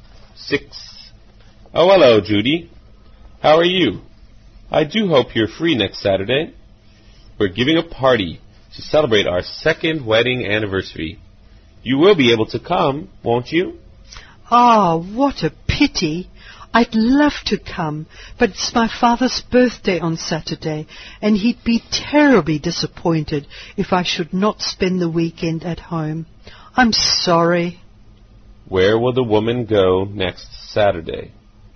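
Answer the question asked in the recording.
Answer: Home, for her father's birthday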